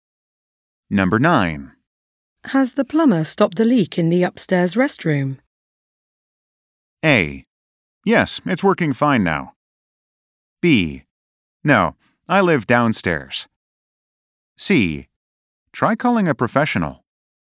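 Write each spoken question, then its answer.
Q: Has the plumber stopped the leak in the upstairs restroom?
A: A: Yes, it's working fine now.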